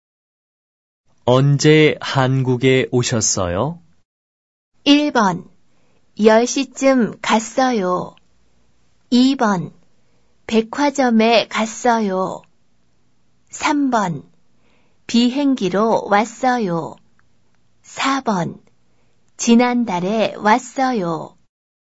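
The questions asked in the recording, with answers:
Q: 언제 한국에 오셨어요?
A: 4: 지난달에 왔어요.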